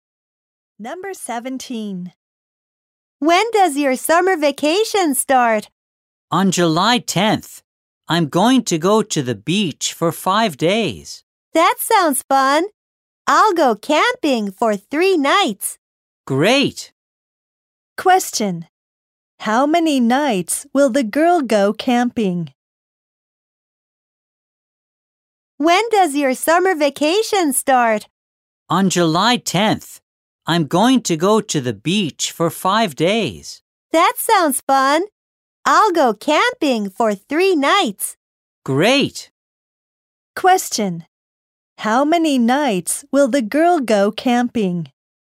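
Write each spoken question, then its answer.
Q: How many nights will the girl go camping?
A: Three nights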